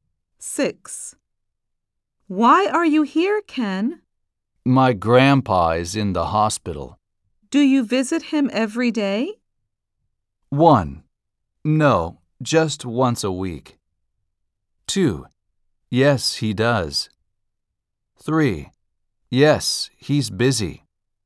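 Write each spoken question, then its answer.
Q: Do you visit him every day?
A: 1: No, just once a week.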